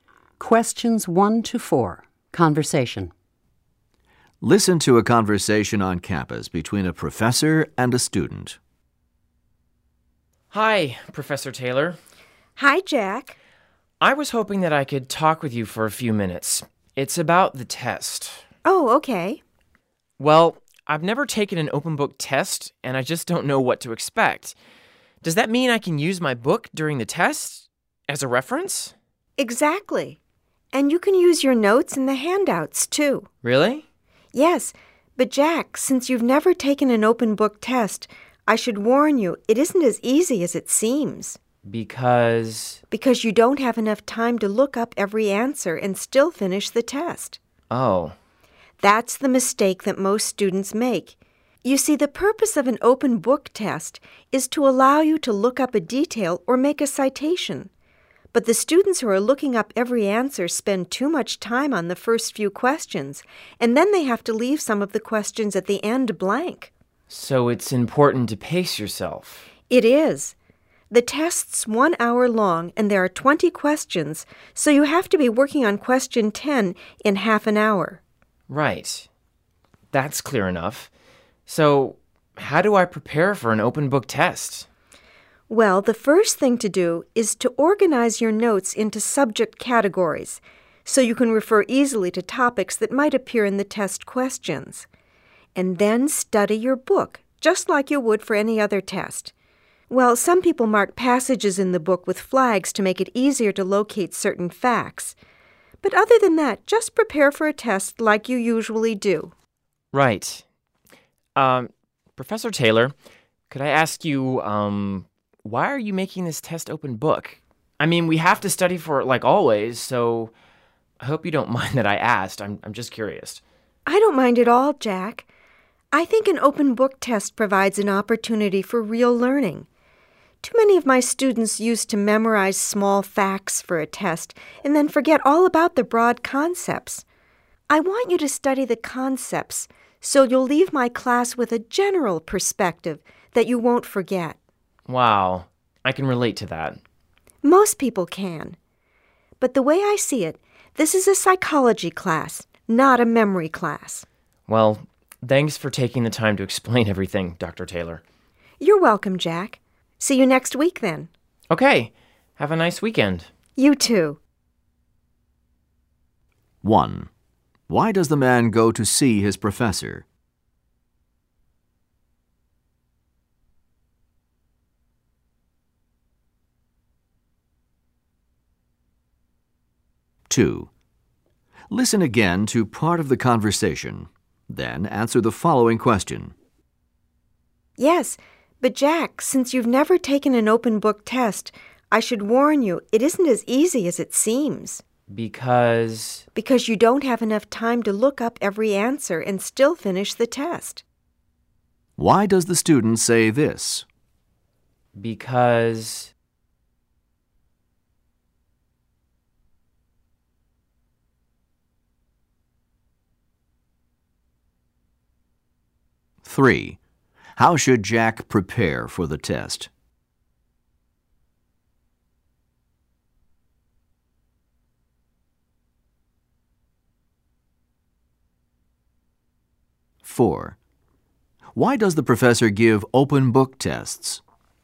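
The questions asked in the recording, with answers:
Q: Why does the man go to see his professor?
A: To ask about the open book test and what to expect

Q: How should Jack prepare for the test?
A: Organize his notes by subject and study the book as for any other test

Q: Why does the professor give open book tests?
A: So students learn broad concepts instead of memorizing small facts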